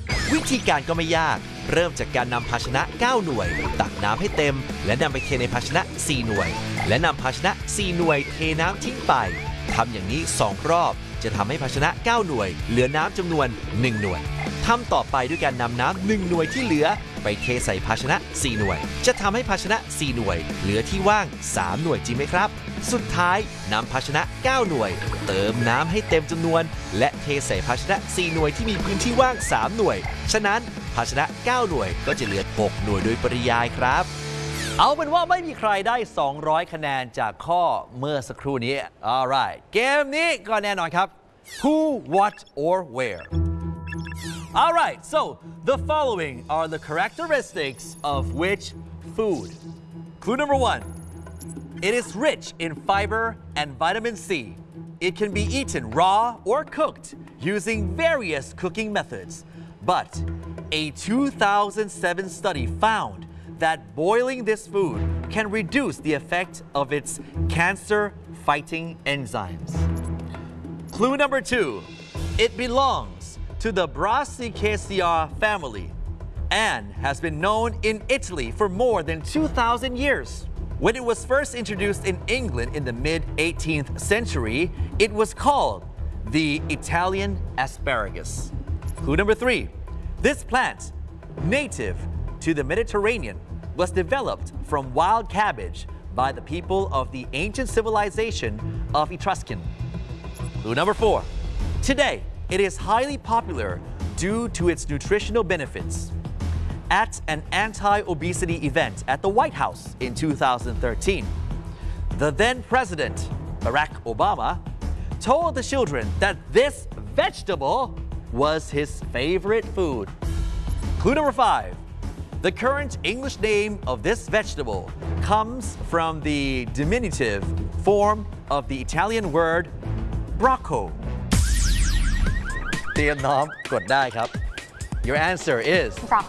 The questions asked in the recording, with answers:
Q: All right, so the following are the characteristics of which food?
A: Broccoli